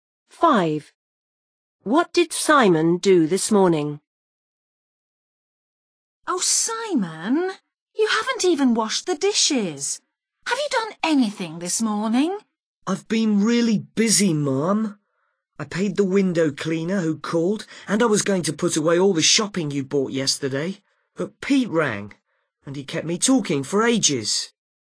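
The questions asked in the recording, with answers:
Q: What did Simon do this morning?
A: He paid the window cleaner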